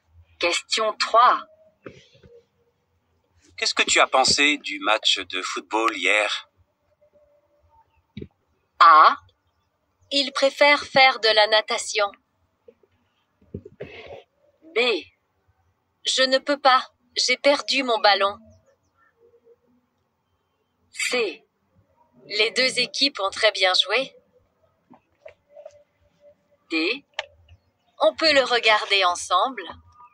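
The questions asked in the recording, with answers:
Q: Qu'est-ce que tu as pensé du match de football hier?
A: C: Les deux équipes ont très bien joué.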